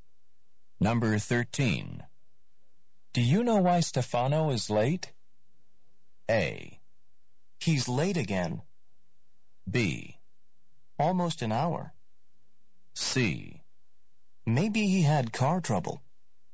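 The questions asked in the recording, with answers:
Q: Do you know why Stefano is late?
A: C: Maybe he had car trouble.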